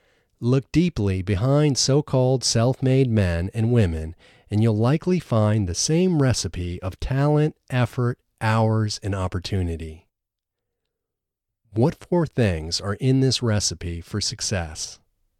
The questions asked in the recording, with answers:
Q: What four things are in this recipe for success?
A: Talent, effort, hours, and opportunity are in this recipe for success.